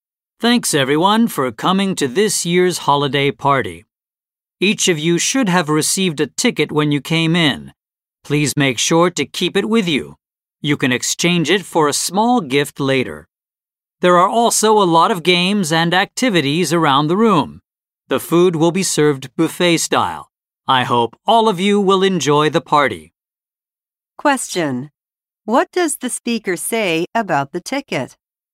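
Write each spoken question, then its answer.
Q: What does the speaker say about the ticket?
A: It can be exchanged for a small gift later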